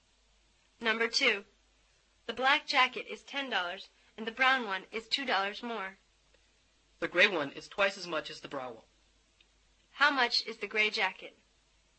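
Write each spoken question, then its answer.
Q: How much is the gray jacket?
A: $24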